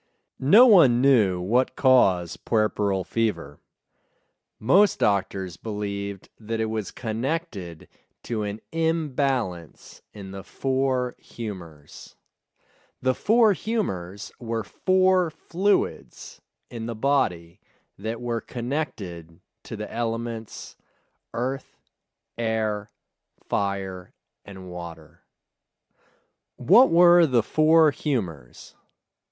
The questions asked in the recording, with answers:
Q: What were the four humors?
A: The four humors were four fluids in the body.